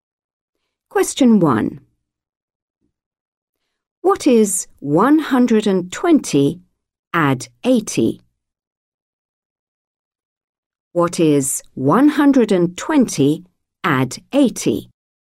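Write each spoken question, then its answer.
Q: What is 120 add 80?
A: 200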